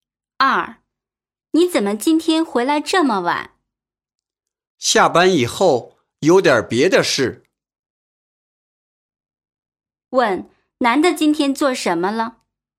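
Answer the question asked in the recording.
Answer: 下班以后办了点别的事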